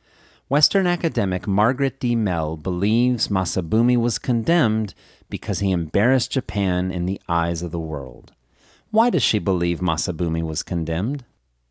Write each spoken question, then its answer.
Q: Why does she believe Masabumi was condemned?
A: She believes Masabumi was condemned because he embarrassed Japan in the eyes of the world.